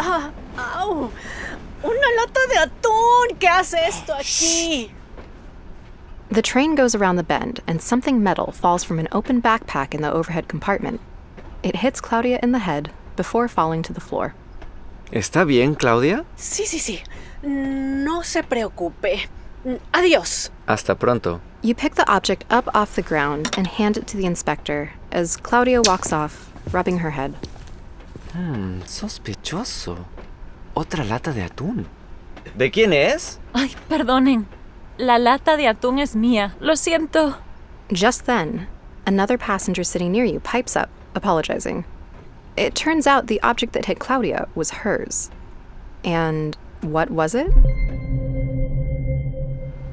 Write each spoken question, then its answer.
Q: And what was it?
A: Right. Una lata de atún. A can of tuna.